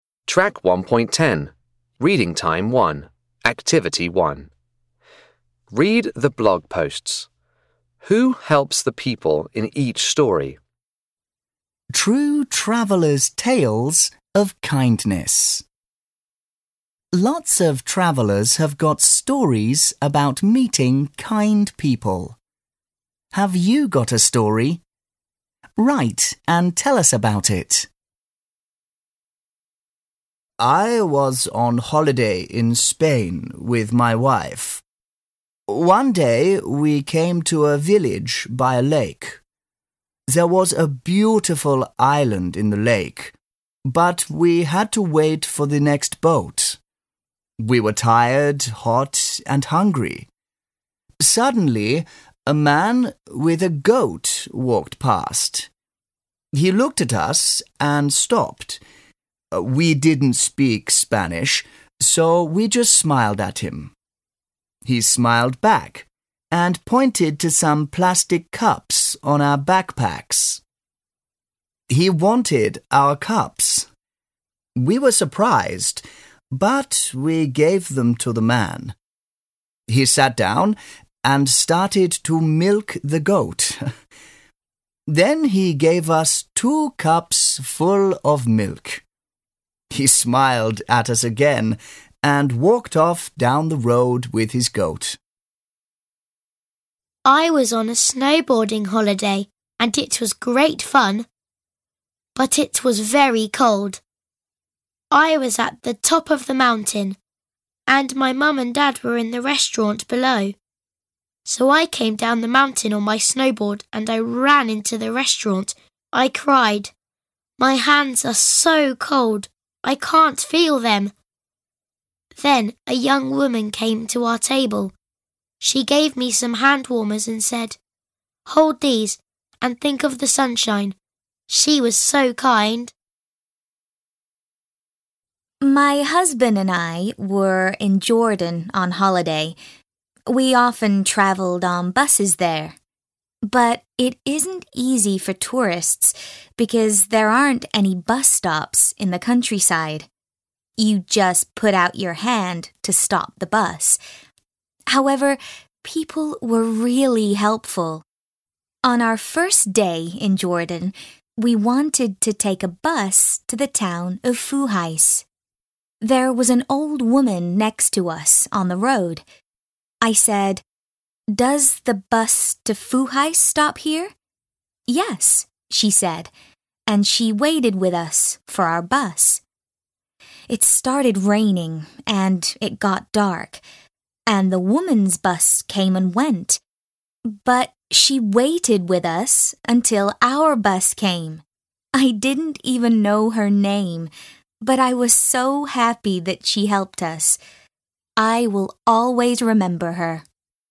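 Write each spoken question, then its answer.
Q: Who helps the people in each story?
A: A man with a goat, a young woman, and an old woman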